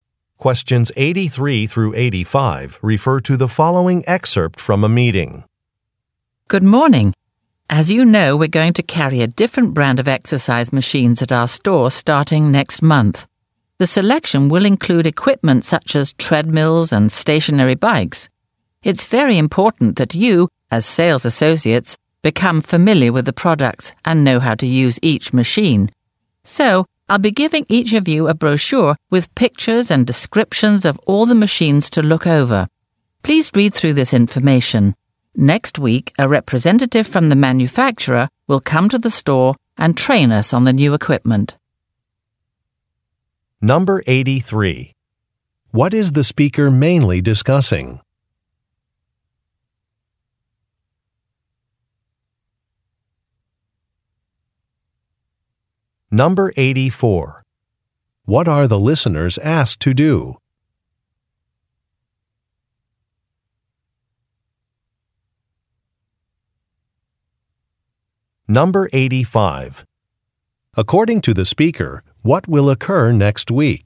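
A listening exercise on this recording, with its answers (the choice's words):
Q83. What is the speaker mainly discussing?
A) A revised work schedule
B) New fitness equipment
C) Opportunities for promotion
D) Free exercise classes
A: New fitness equipment

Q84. What are the listeners asked to do?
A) Read about some products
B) Submit hours of availability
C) Contact a supplier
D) Fill out an application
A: Read about some products

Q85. According to the speaker, what will occur next week?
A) A holiday sale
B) A store opening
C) A training session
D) A trade show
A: A training session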